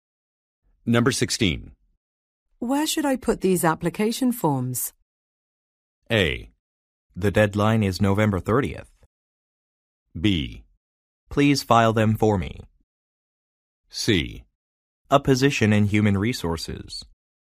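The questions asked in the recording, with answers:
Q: Where should I put these application forms?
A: B: Please file them for me.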